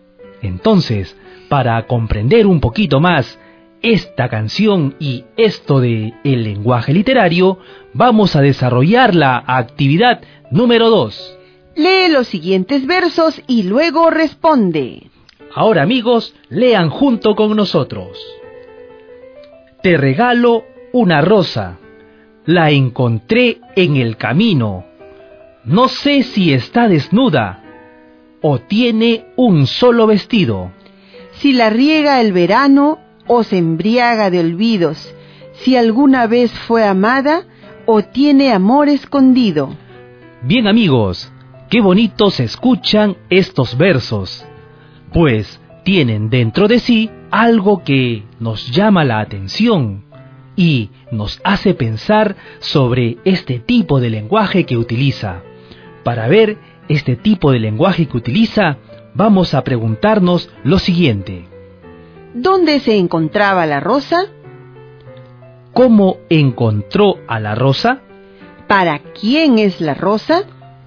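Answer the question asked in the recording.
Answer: En el camino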